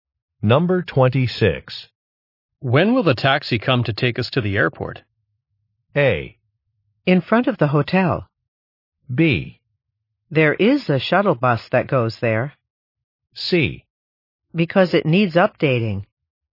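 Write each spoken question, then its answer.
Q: When will the taxi come to take us to the airport?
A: B: There is a shuttle bus that goes there.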